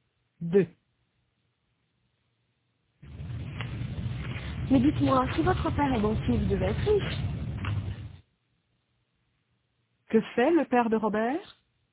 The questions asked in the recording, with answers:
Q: Que fait le père de Robert?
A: Il est banquier.